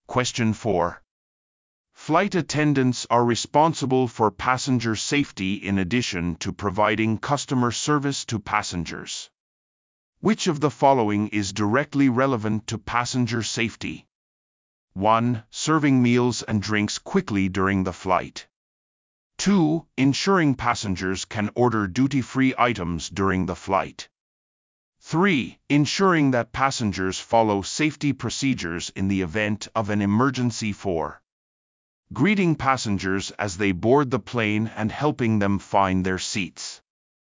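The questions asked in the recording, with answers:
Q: Which of the following is directly relevant to passenger safety?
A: 3: Ensuring that passengers follow safety procedures in the event of an emergency.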